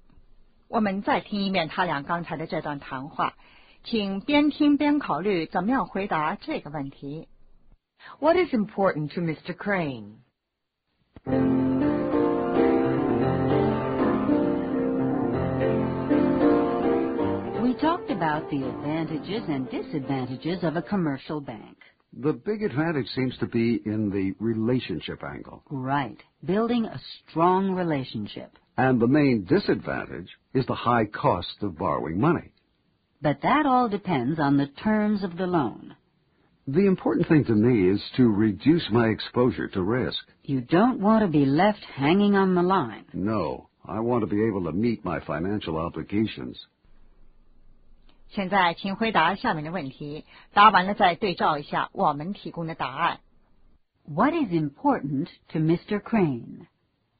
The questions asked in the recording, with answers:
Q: What is important to Mr. Crane?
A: To reduce his exposure to risk.